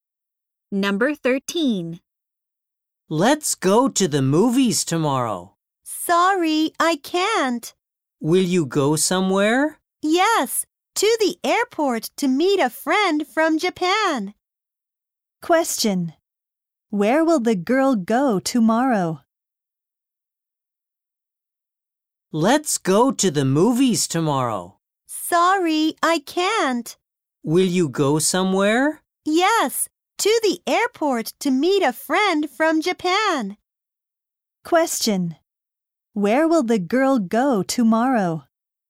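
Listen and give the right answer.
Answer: To the airport.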